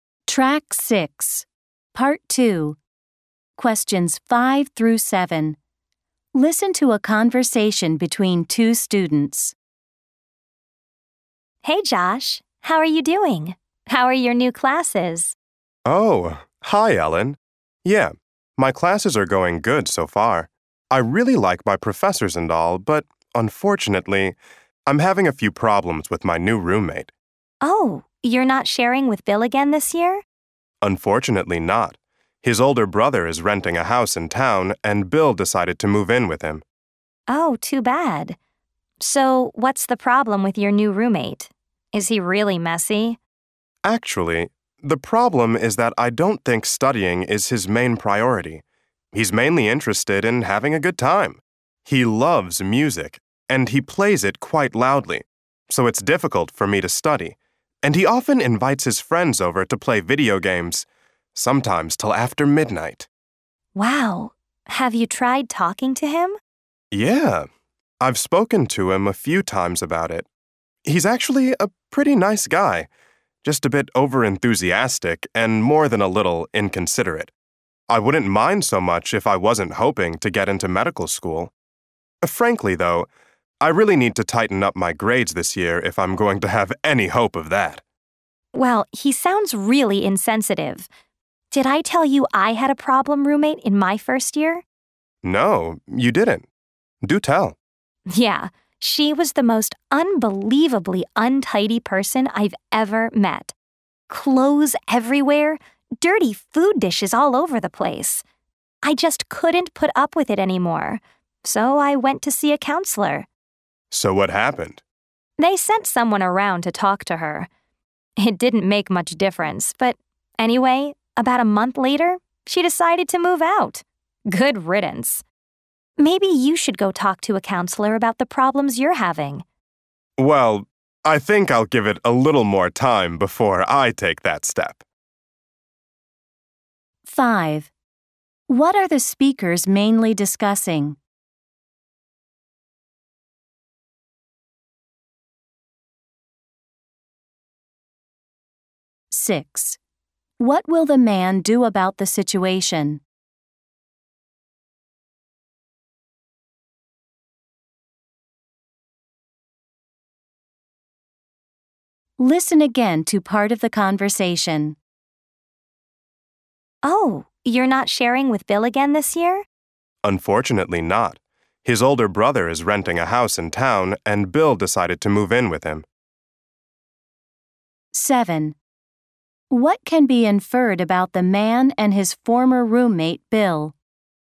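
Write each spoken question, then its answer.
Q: What are the speakers mainly discussing?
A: Problems with the man's new roommate

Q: What will the man do about the situation?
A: Wait a little longer before seeing a counselor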